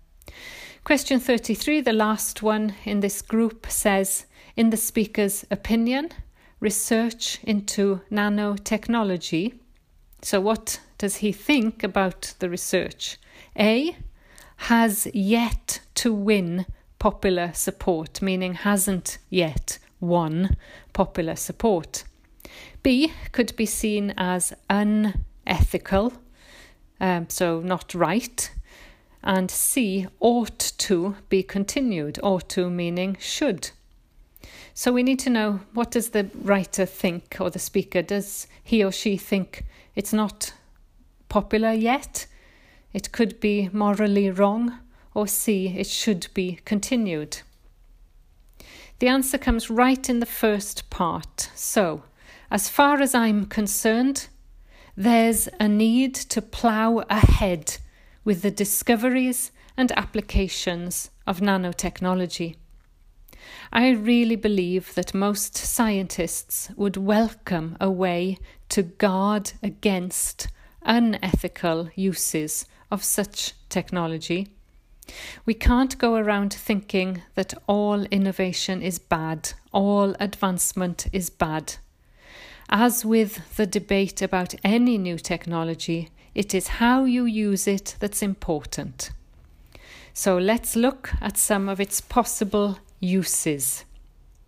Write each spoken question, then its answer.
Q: in the speaker's opinion, research into nanotechnology.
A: So the answer is C, it ought to be continued.